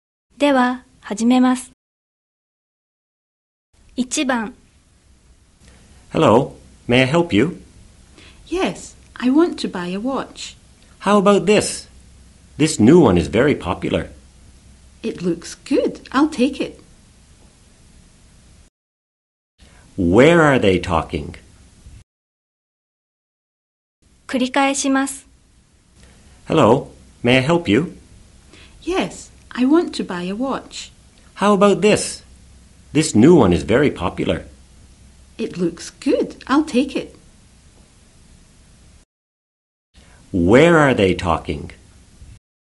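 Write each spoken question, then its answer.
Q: Where are they talking?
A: At a shop (a watch store)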